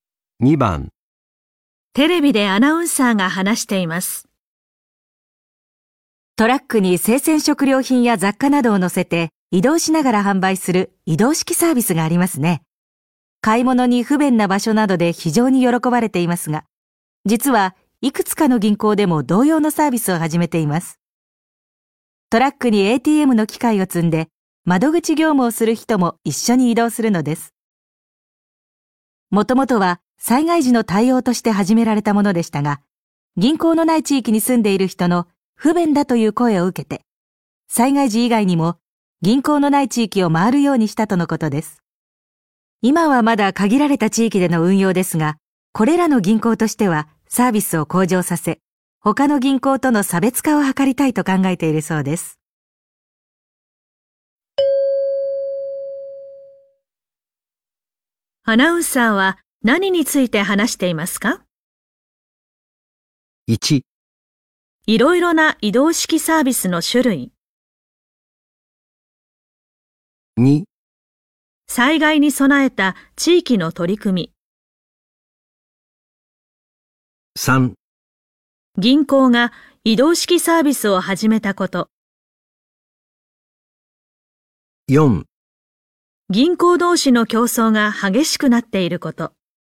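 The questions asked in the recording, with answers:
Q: アナウンサーは何について話していますか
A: 3: 銀行が移動式サービスを始めたこと。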